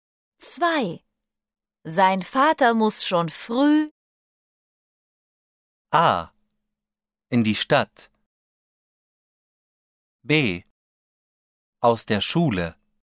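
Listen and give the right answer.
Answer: A: In die Stadt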